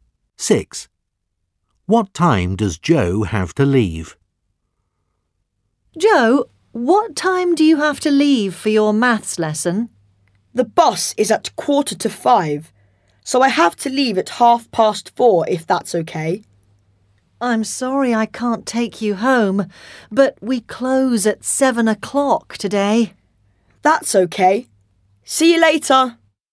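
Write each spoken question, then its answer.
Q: What time does Joe have to leave?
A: 4:30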